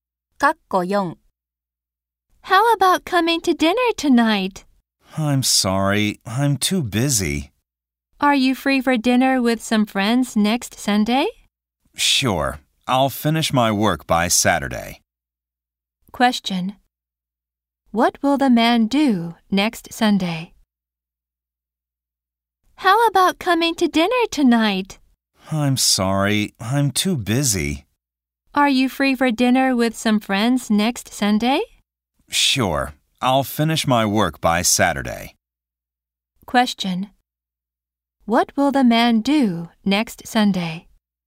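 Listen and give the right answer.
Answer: Have dinner with friends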